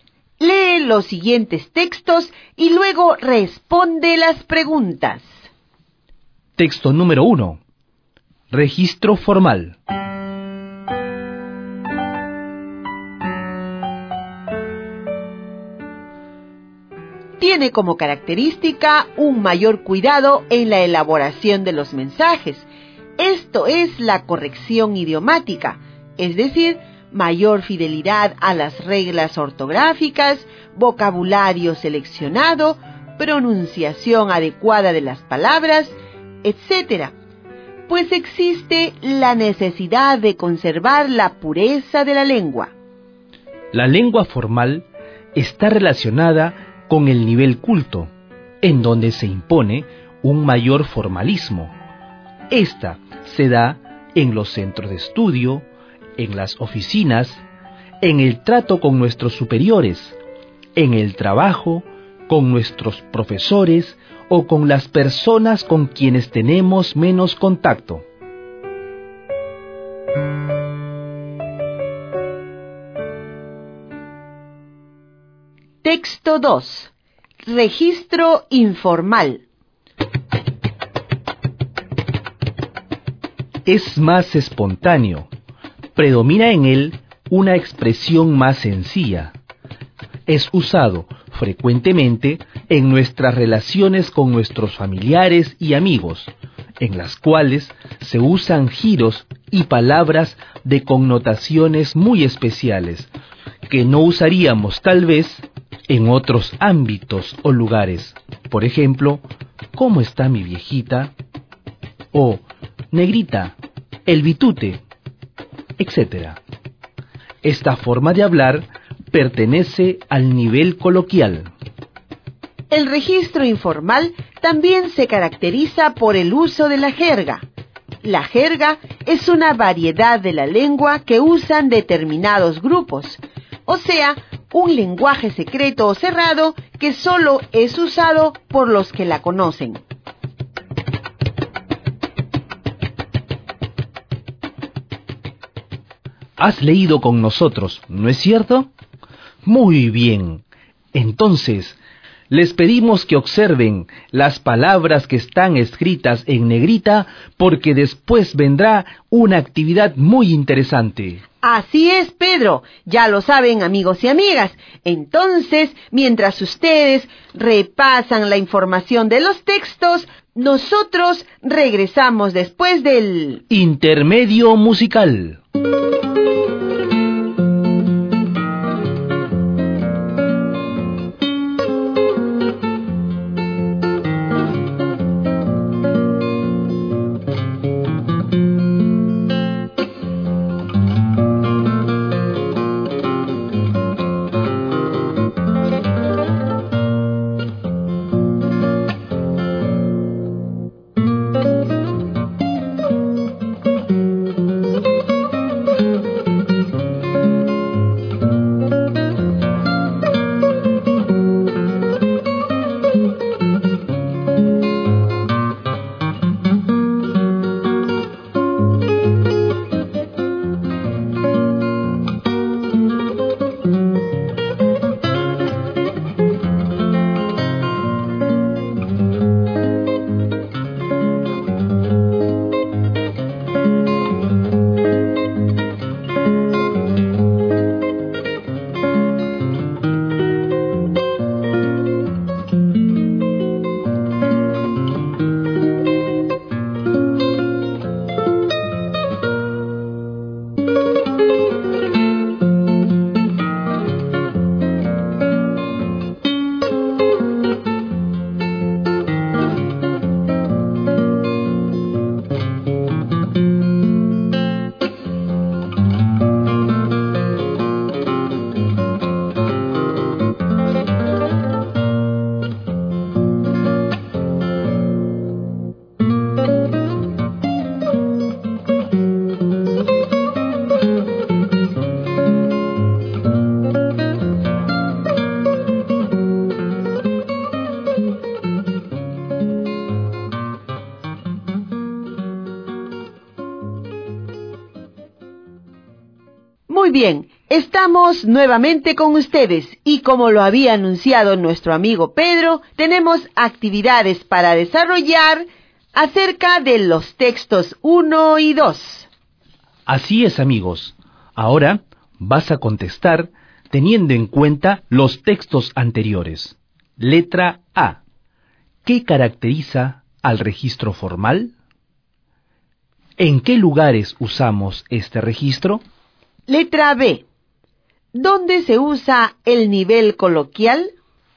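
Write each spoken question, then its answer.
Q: Letra A. ¿Qué caracteriza al registro formal?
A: Un mayor cuidado en la elaboración de los mensajes: corrección idiomática

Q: ¿En qué lugares usamos este registro?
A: En los centros de estudio, las oficinas, el trabajo

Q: Letra B. ¿Dónde se usa el nivel coloquial?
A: En las relaciones con familiares y amigos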